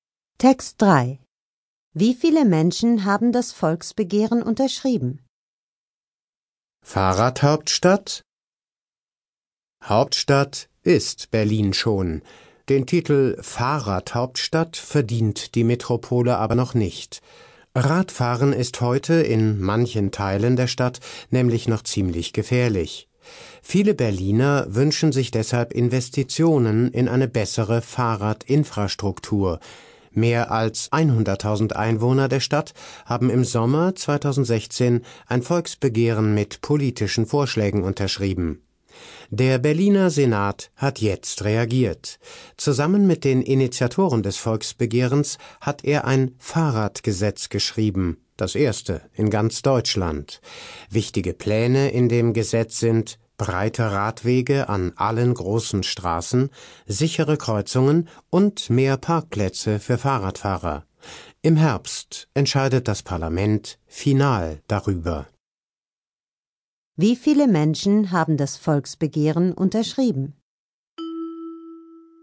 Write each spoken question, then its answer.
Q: Wie viele Menschen haben das Volksbegehren unterschrieben?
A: Es haben 100.000 Menschen unterschrieben.